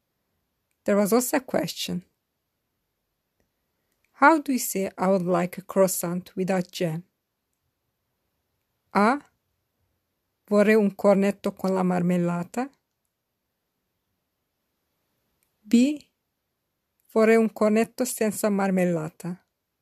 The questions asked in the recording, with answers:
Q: How do you say I would like a croissant without jam?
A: The correct answer is B. Vorrei un cornetto senza marmellata.